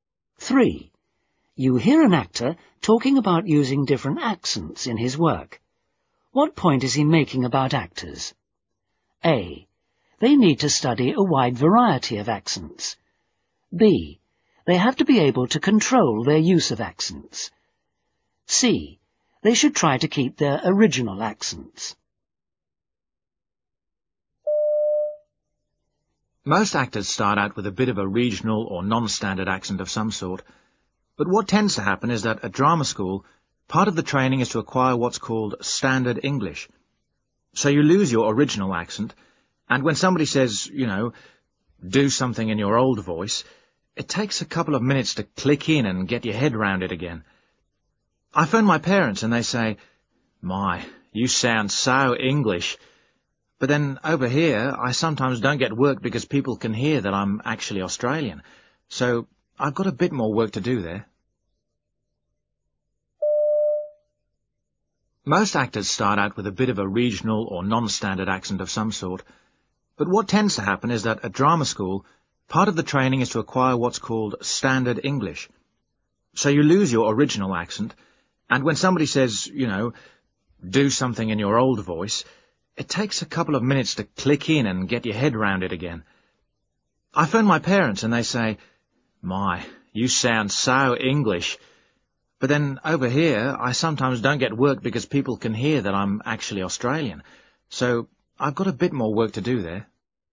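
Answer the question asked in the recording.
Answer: B: They have to be able to control their use of accents.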